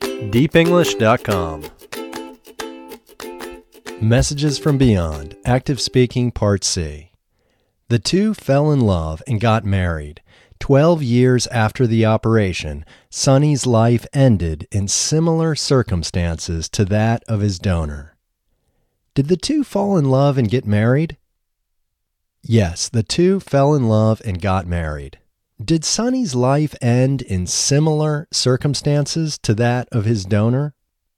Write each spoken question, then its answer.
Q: Did Sonny's life end in similar circumstances to that of his donor?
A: Yes, Sonny's life ended in similar circumstances to that of his donor.